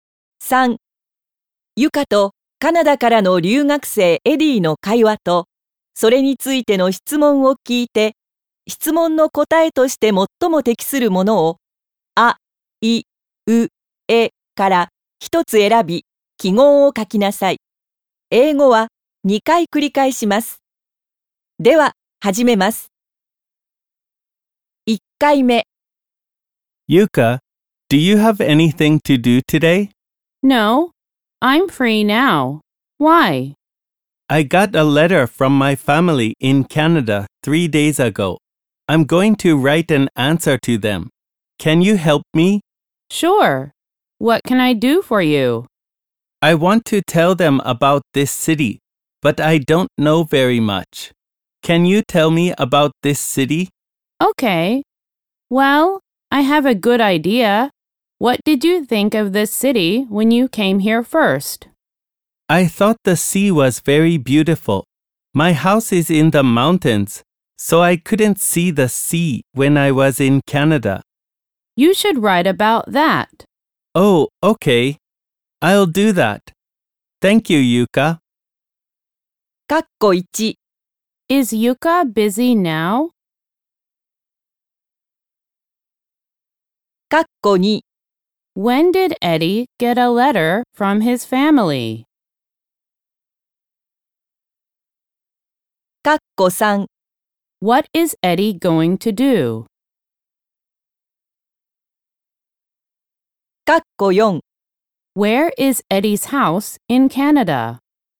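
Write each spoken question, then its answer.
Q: Is Yuka busy now?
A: No, she is free now

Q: When did Eddie get a letter from his family?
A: Three days ago

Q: What is Eddie going to do?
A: Write an answer to his family

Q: Where is Eddie's house in Canada?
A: In the mountains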